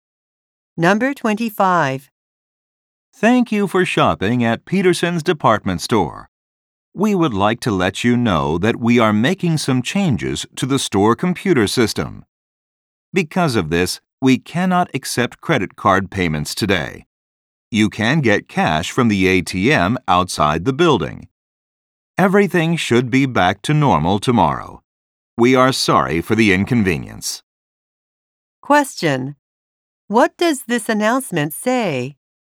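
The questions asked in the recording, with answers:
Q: What does this announcement say?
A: Credit card payments cannot be accepted today.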